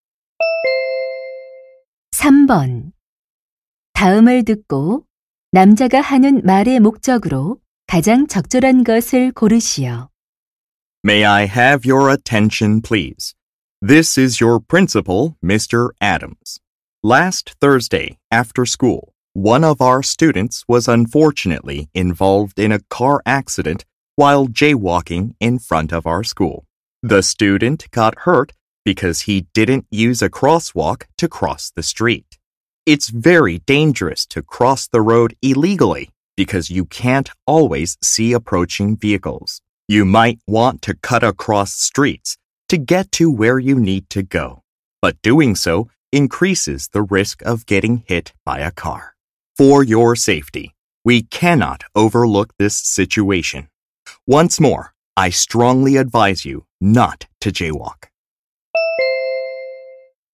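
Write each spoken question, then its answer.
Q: 다음을 듣고 남자가 하는 말의 목적으로 가장 적절한 것을 고르시오.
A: 무단횡단을 하지 말 것을 당부하려고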